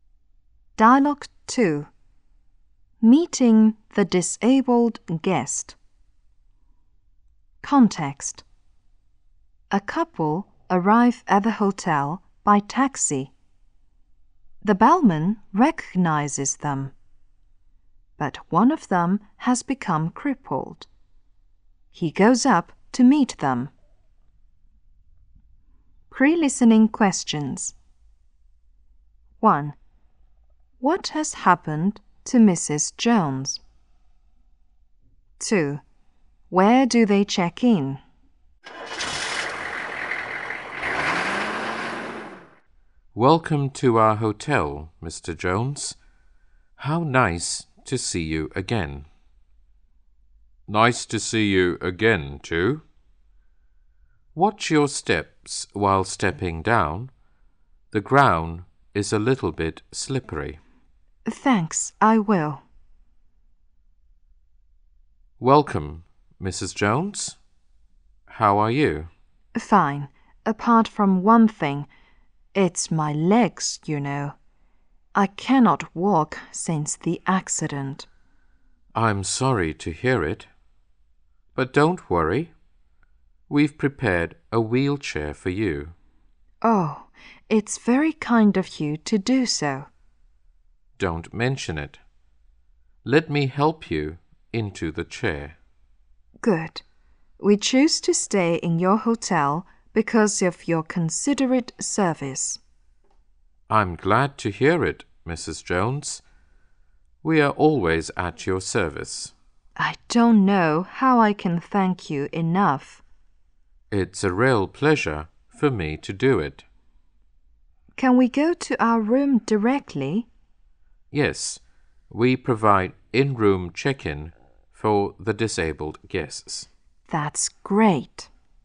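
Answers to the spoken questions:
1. She can't walk since an accident.
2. In their room (in-room check-in).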